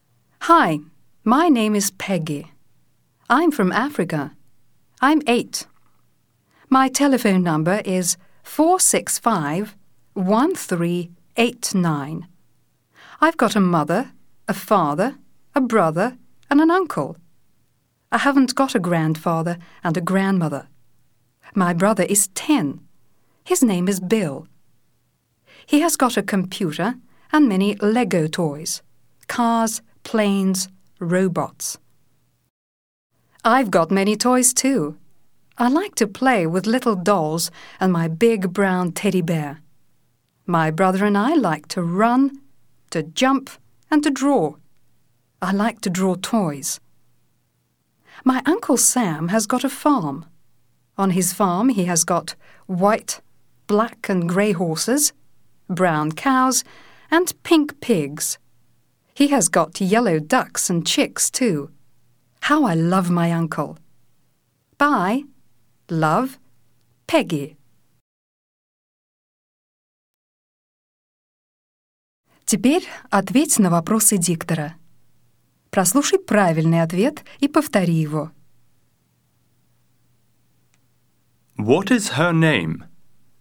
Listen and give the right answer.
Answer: Her name is Peggy.